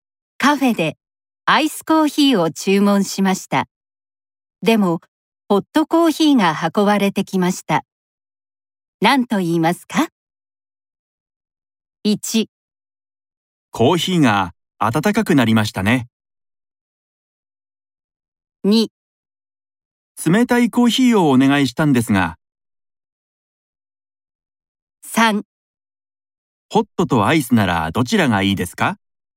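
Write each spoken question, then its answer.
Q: 何と言いますか ?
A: 2: 冷たいコーヒーをお願いしたんですが。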